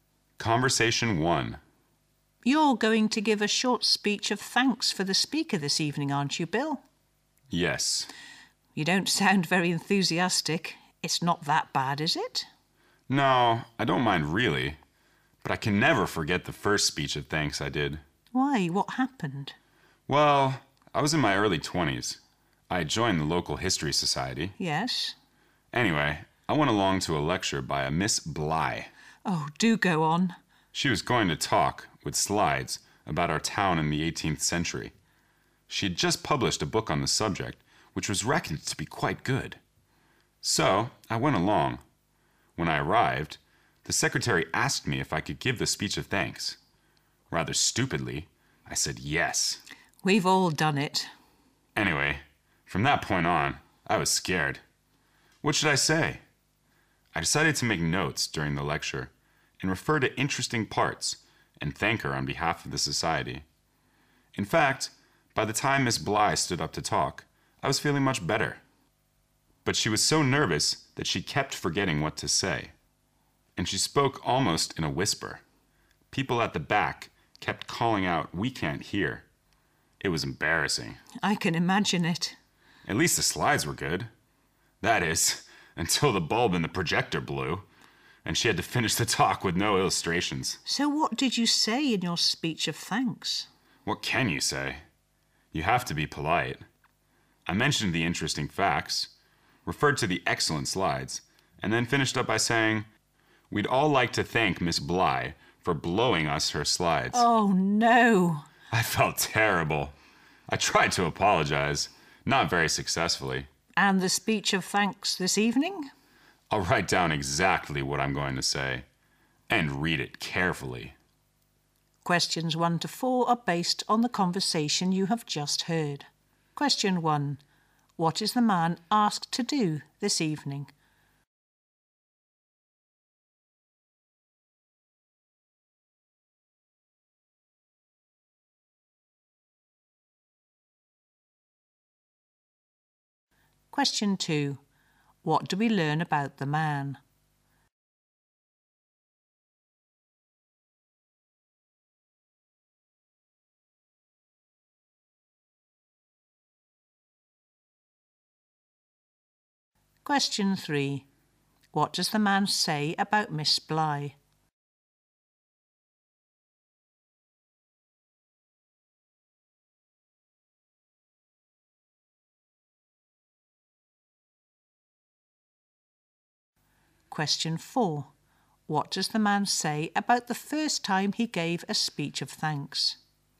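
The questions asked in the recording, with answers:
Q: What is the man asked to do this evening?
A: Give a short speech of thanks for the speaker

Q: What does the man say about Miss Bly?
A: She was so nervous she kept forgetting what to say and spoke almost in a whisper

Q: What does the man say about the first time he gave a speech of thanks?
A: He made an embarrassing slip, thanking Miss Bly for "blowing us her slides"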